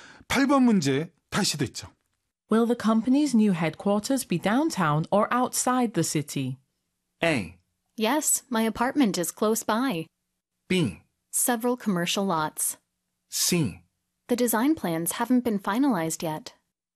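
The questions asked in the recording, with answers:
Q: Will the company's new headquarters be downtown or outside the city?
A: C: The design plans haven't been finalized yet.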